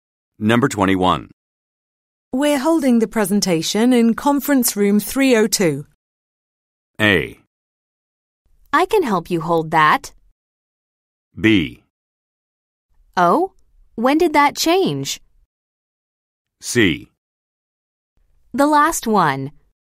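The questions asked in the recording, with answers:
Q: We're holding the presentation in conference room 302.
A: B: Oh, when did that change?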